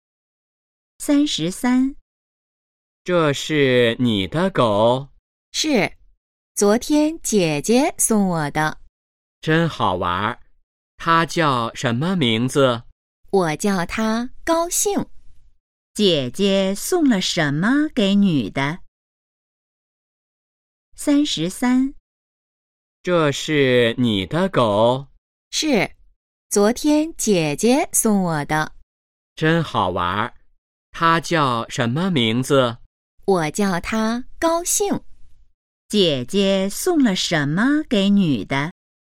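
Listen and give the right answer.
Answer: 一只狗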